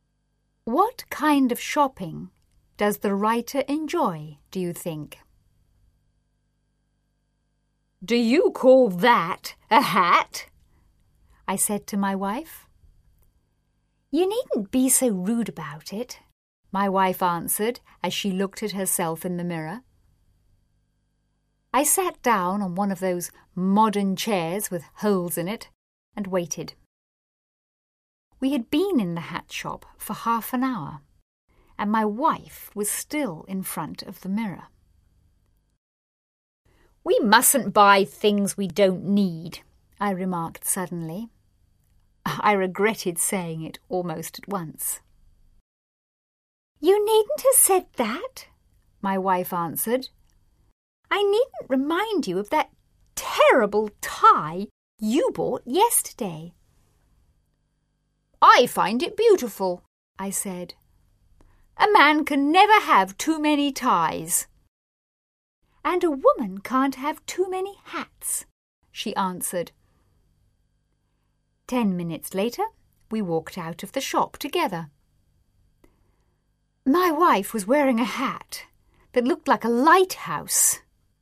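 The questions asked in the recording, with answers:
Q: What kind of shopping does the writer enjoy, do you think?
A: Buying ties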